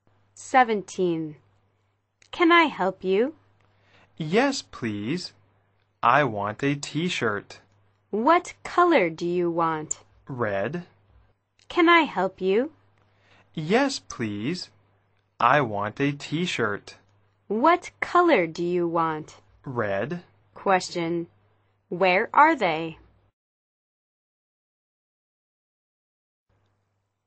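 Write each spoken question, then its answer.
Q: Where are they?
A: In a clothes store.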